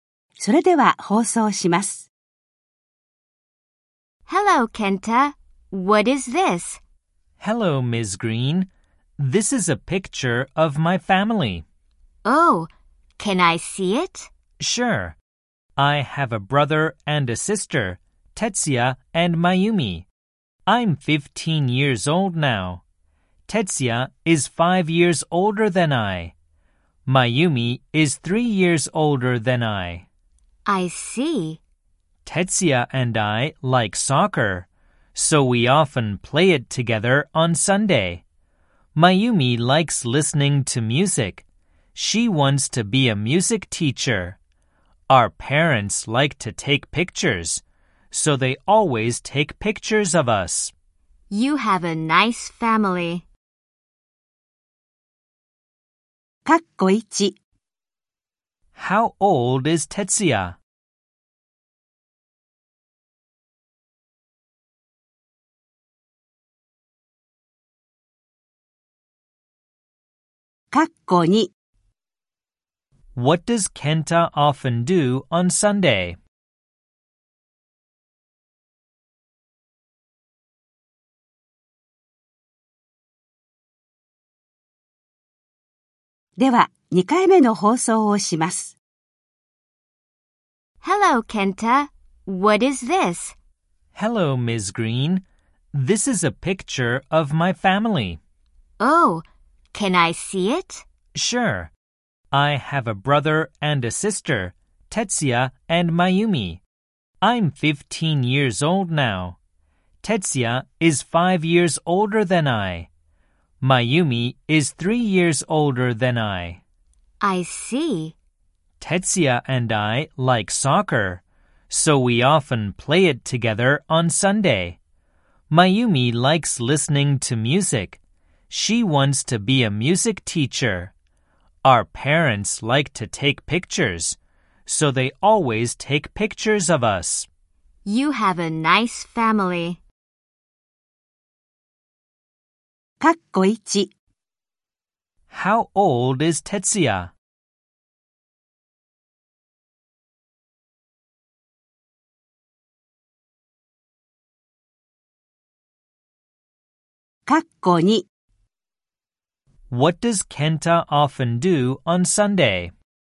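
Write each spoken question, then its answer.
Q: How old is Tetsuya?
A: He is 20 years old.

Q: What does Kenta often do on Sunday?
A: He plays soccer with Tetsuya.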